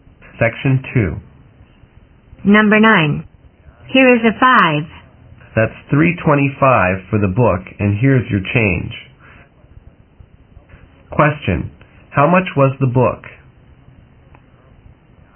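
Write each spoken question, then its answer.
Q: How much was the book?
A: $3.25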